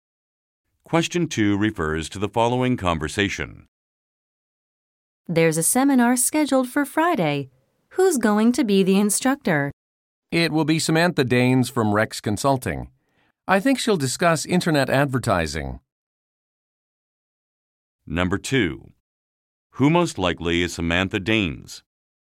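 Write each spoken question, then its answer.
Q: Who most likely is Samantha Danes?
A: A seminar instructor from Rex Consulting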